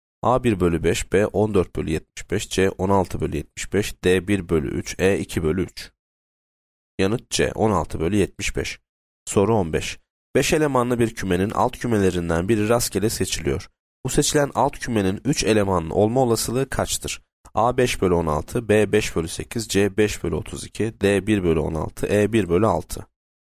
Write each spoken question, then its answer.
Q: Bu seçilen alt kümenin 3 elemanlı olma olasılığı kaçtır?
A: Yanıt A 5 bölü 16.